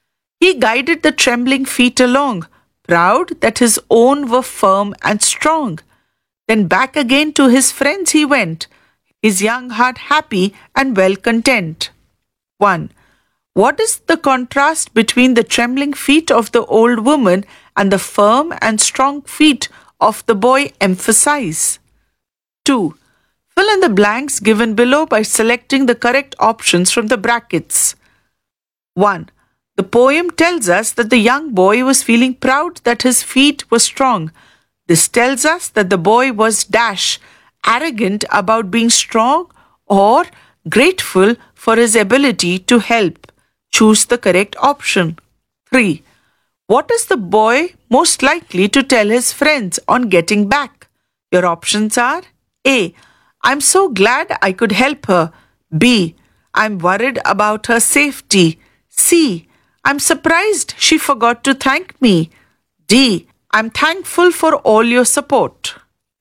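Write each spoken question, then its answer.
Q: This tells us that the boy was arrogant about being strong or grateful for his ability to help.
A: grateful for his ability to help

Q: What is the boy most likely to tell his friends on getting back?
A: A: I'm so glad I could help her.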